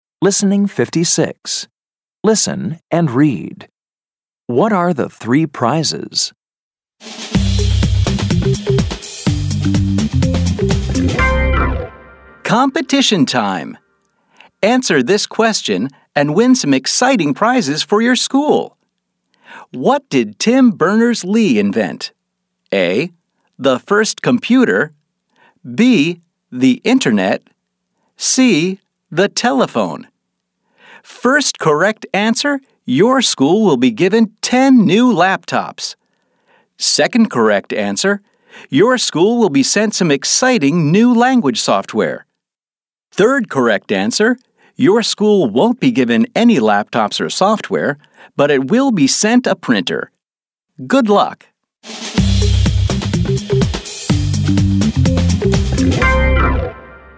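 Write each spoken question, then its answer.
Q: What are the three prizes?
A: 10 new laptops, some new language software, and a printer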